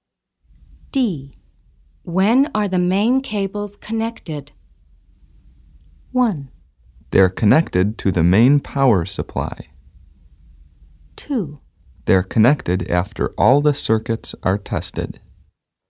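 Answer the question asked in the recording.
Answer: 2: They're connected after all the circuits are tested.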